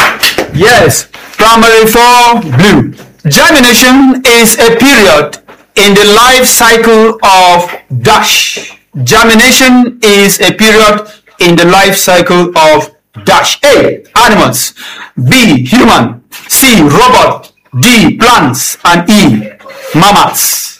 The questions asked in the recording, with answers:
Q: Germination is a period in the life cycle of dash.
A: D, plants.